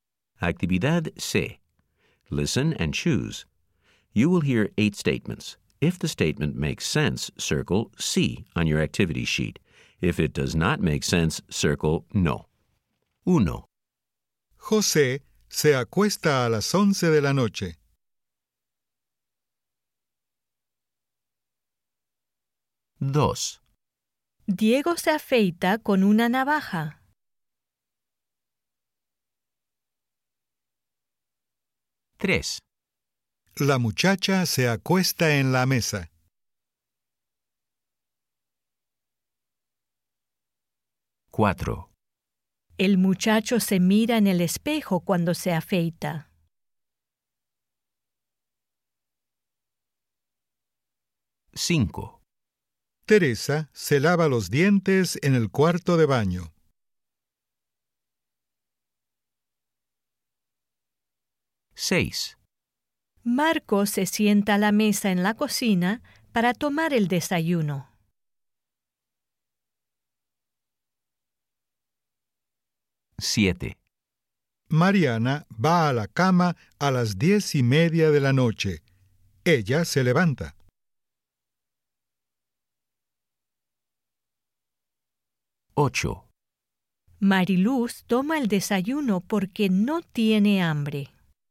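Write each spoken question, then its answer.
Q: José se acuesta a las 11 de la noche.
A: Sí

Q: Diego se afeita con una navaja.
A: Sí

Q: La muchacha se acuesta en la mesa.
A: No

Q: El muchacho se mira en el espejo cuando se afeita.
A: Sí

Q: Teresa se lava los dientes en el cuarto de baño.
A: Sí

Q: Marco se sienta a la mesa en la cocina para tomar el desayuno.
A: Sí

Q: Mariluz toma el desayuno porque no tiene hambre.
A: No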